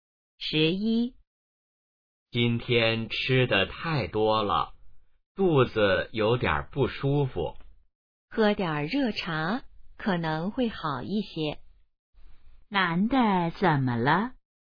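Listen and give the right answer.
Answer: 吃得太多,肚子不舒服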